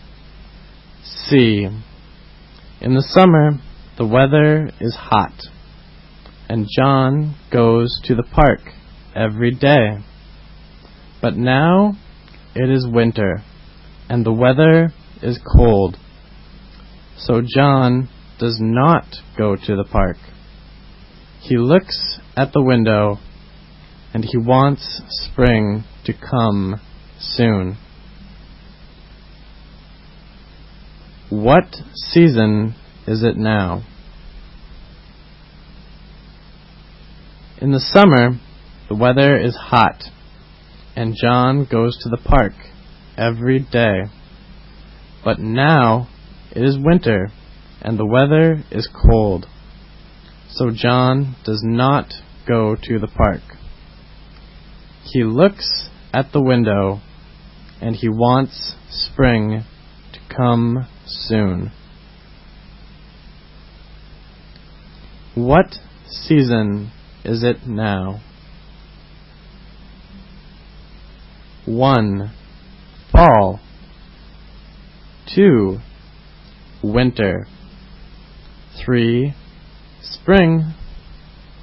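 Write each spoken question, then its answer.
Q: What season is it now?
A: 2: Winter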